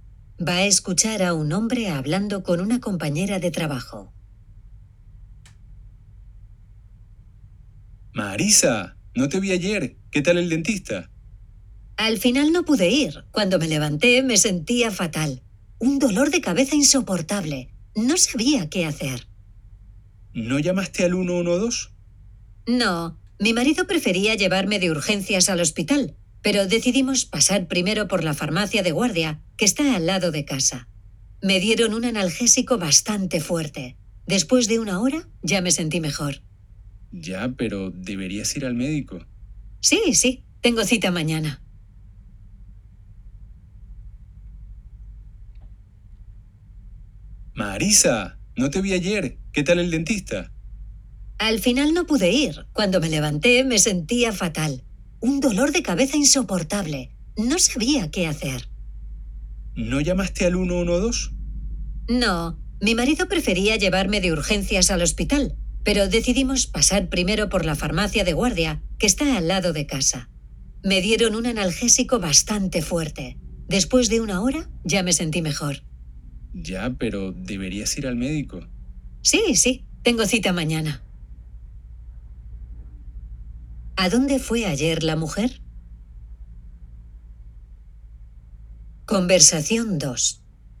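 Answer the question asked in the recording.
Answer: A la farmacia de guardia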